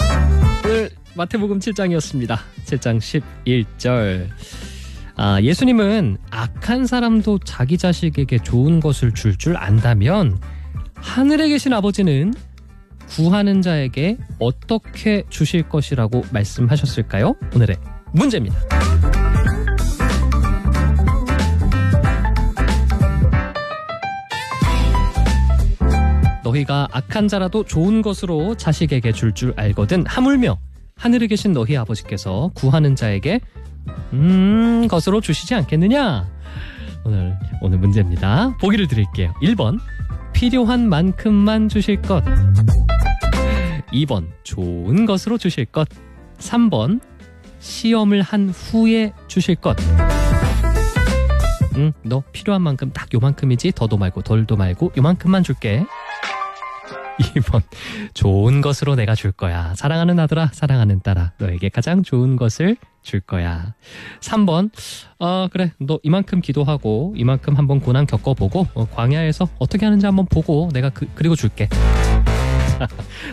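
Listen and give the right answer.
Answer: 2: 좋은 것으로 주실 것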